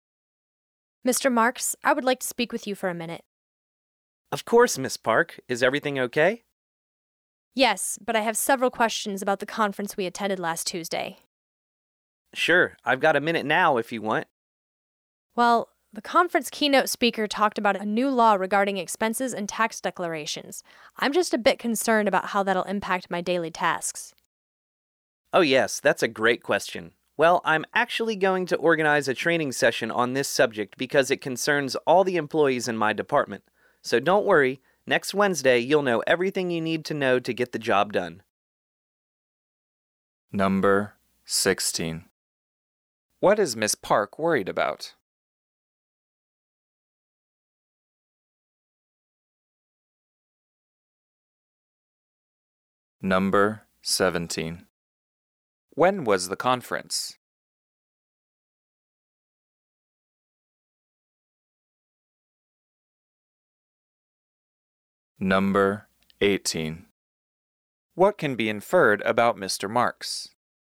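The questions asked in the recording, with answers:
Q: What is Miss Park worried about?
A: How a new law on expenses and tax declarations will affect her daily tasks

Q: When was the conference?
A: Last Tuesday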